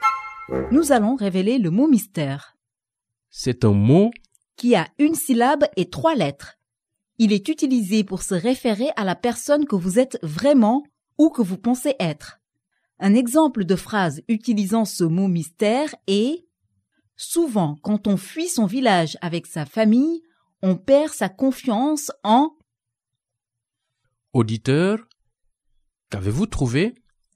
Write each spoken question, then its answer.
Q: Auditeur, qu'avez-vous trouvé ?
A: Le mot mystère d'aujourd'hui est soi.